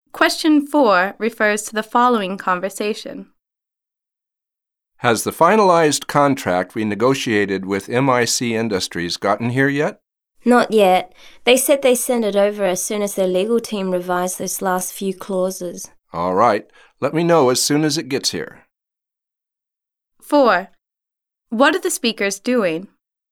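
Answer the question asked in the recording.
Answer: Waiting for a finalized contract from MIC Industries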